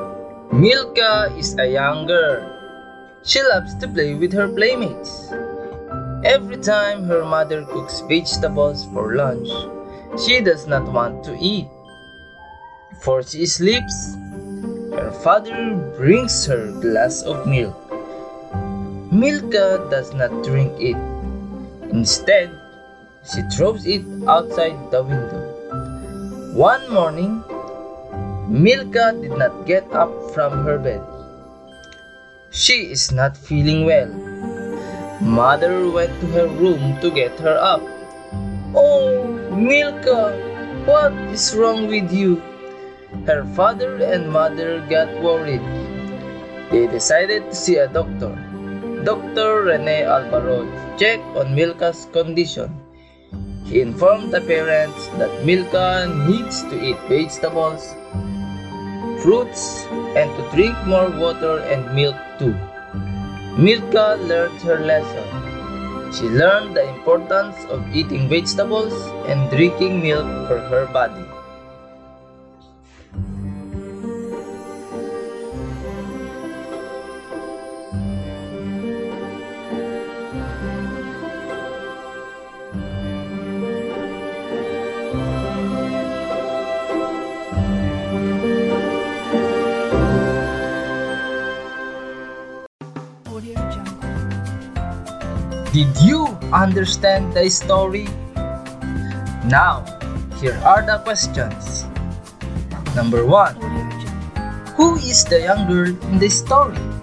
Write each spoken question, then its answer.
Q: Who is the young girl in the story?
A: If you answered Milka, you are correct.